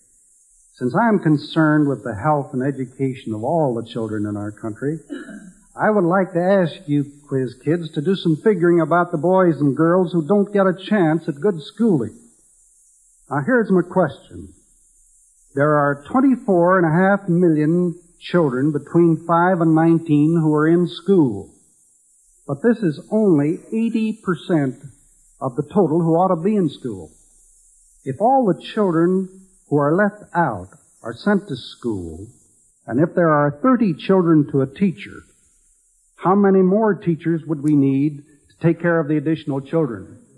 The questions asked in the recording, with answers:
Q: If all the children who are left out are sent to school, and if there are 30 children to a teacher, how many more teachers would we need to take care of the additional children?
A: 204,167.